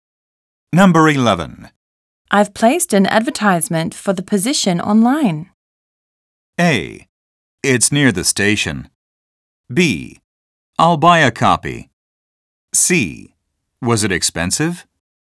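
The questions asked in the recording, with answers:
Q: I've placed an advertisement for the position online.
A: C: Was it expensive?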